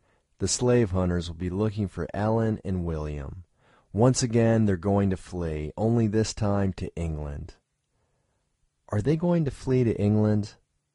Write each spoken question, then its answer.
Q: Are they going to flee to England?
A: Yes, they're going to flee to England.